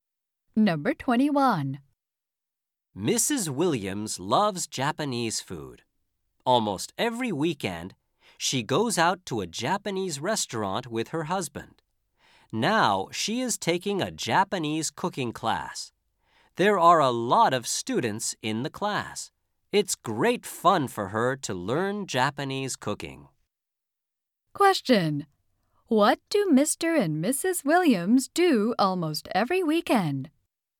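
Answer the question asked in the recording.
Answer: They go out to a Japanese restaurant.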